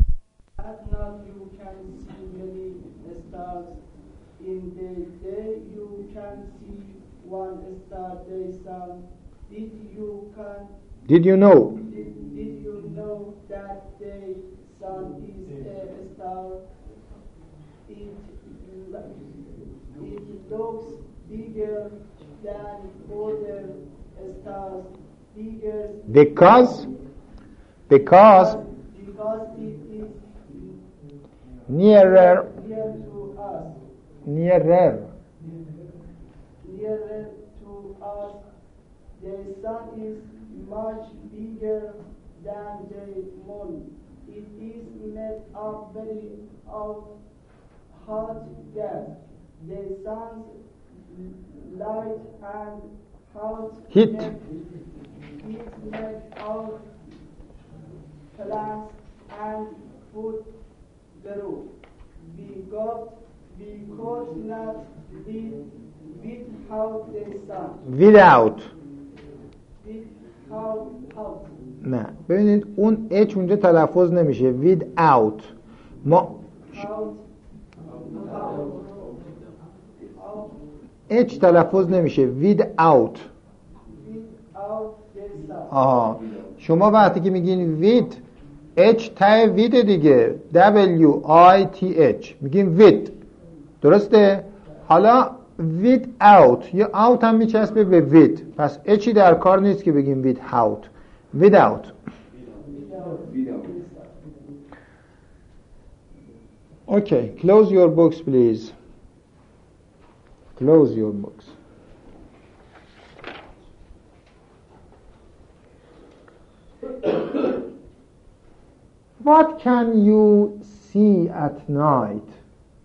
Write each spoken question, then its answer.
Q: what can you see at night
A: many stars